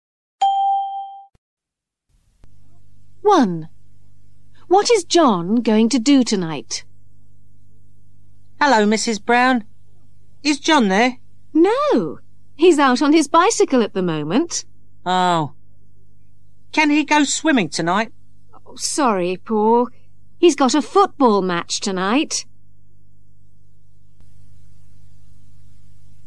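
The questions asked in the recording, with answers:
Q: What is John going to do tonight?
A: Play in a football match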